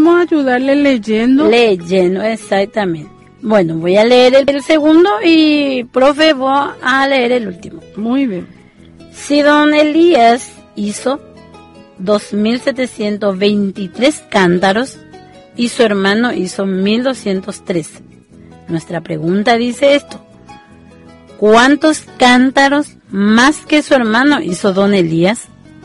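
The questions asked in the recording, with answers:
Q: ¿cuántos cántaros más que su hermano hizo don Elías?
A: 1.520 cántaros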